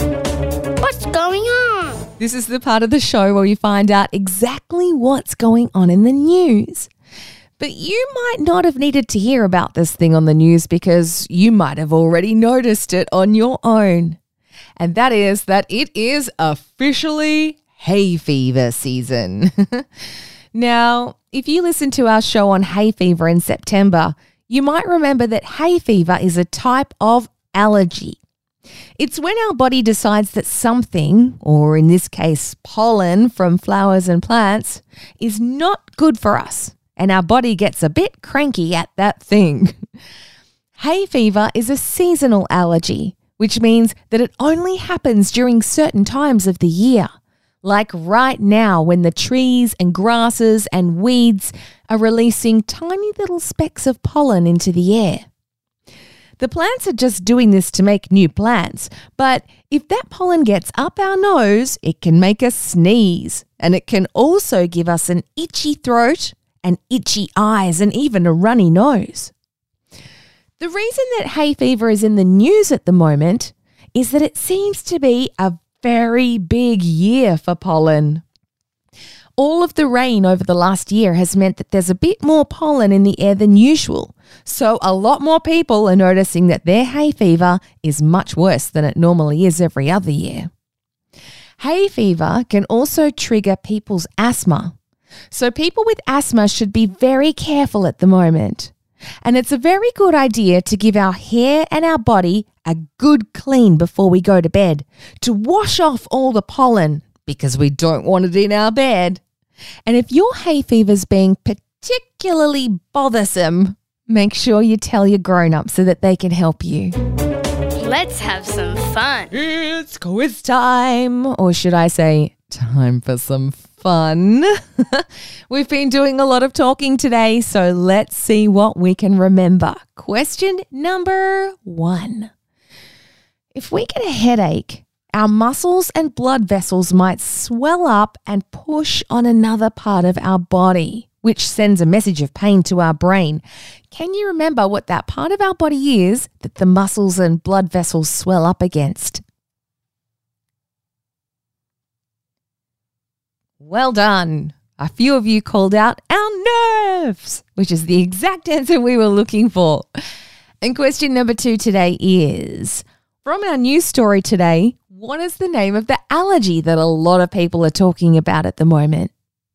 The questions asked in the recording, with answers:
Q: from our news story today, what is the name of the allergy that a lot of people are talking about at the moment?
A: It's hay fever.